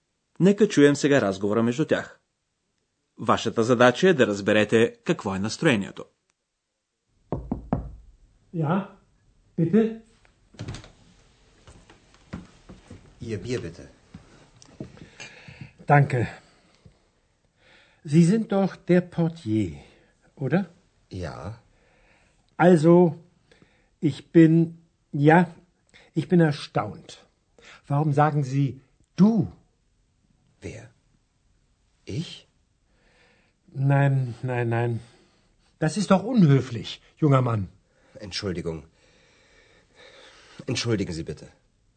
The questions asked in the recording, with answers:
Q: Вашата задача е да разберете какво е настроението.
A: атмосферата не е особено сърдечна, нали?